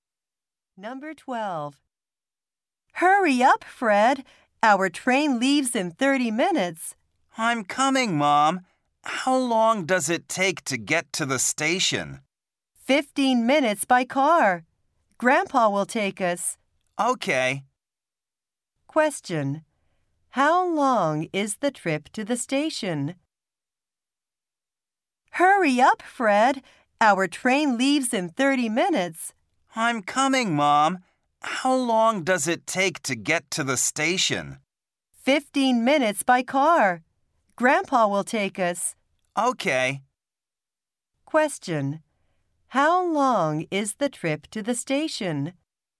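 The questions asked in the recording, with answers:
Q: How long is the trip to the station?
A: 15 minutes.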